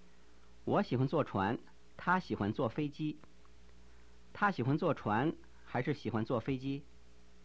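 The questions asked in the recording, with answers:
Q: 他喜欢坐船还是喜欢坐飞机?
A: 坐飞机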